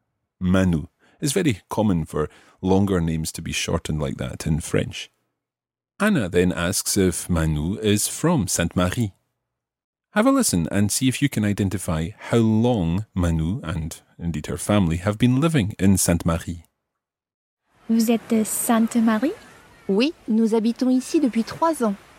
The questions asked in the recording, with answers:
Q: Have a listen and see if you can identify how long Manu and indeed her family have been living in Sainte-Marie.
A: It's 3. 3 ans, 3 years. So, we've been living here for 3 years.